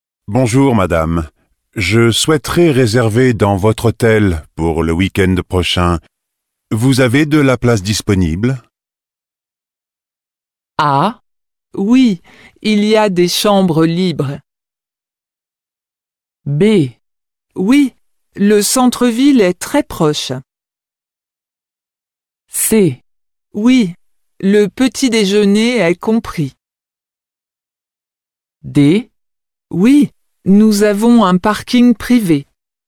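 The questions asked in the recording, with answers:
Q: Vous avez de la place disponible?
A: A: Ah, oui, il y a des chambres libres.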